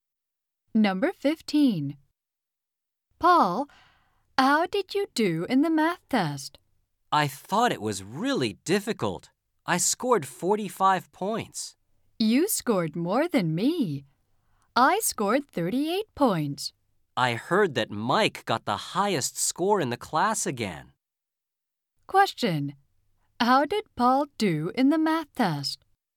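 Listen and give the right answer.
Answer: He scored 45 points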